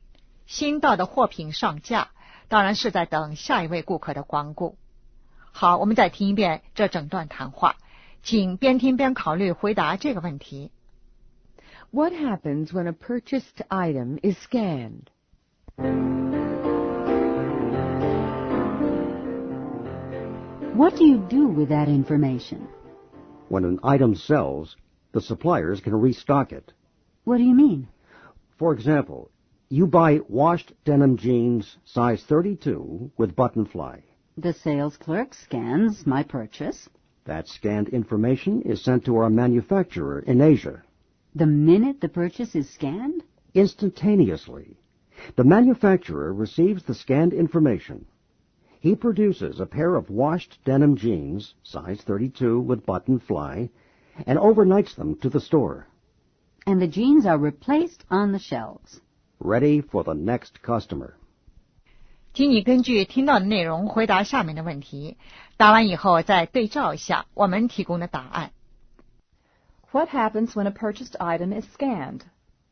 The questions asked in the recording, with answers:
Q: What happens when a purchased item is scanned?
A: Information is sent to the factory.